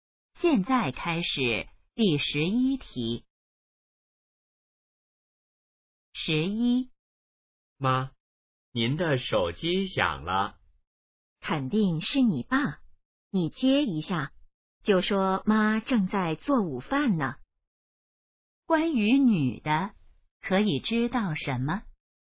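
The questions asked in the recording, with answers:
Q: 关于女的,可以知道什么?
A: 她正在做午饭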